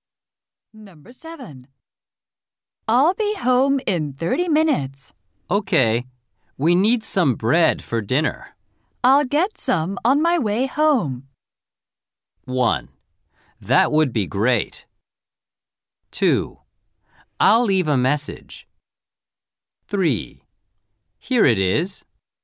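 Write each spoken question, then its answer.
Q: I'll get some on my way home.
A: 1: That would be great.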